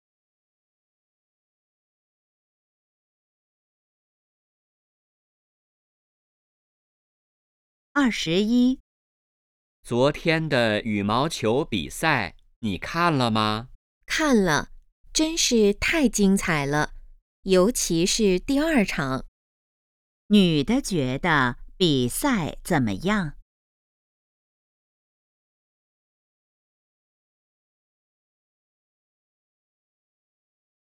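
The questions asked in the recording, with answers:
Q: 女的觉得比赛怎么样?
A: 非常精彩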